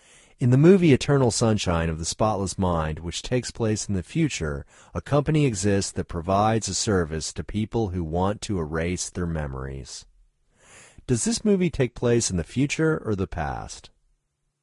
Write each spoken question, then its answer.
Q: Does this movie take place in the future or the past?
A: This movie takes place in the future.